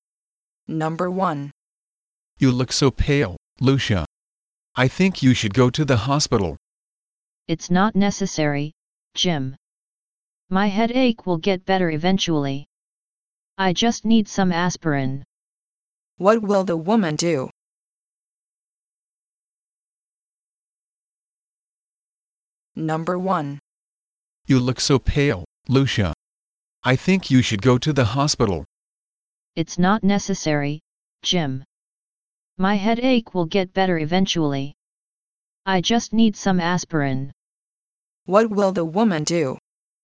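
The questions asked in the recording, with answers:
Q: What will the woman do?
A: Take some aspirin (not go to the hospital)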